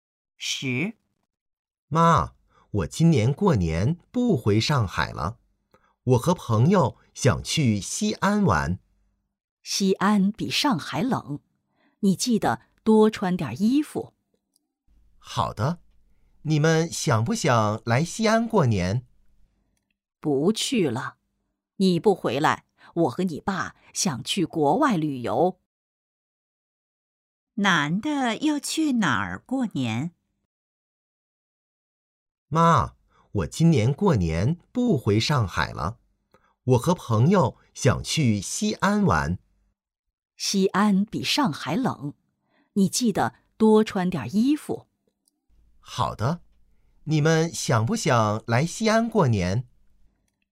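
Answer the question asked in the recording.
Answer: 西安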